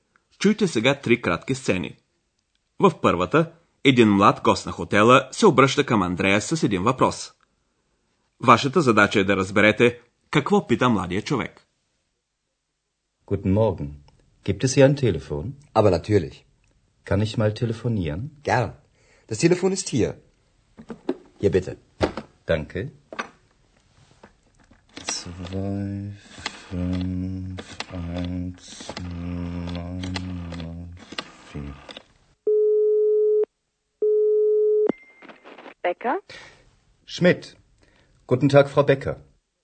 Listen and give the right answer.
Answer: Сигурно разбрахте, че младият човек търси телефон.